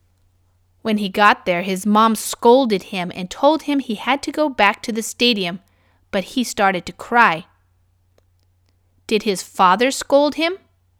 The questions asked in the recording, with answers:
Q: Did his father scold him?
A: No, not his father. His mother scolded him.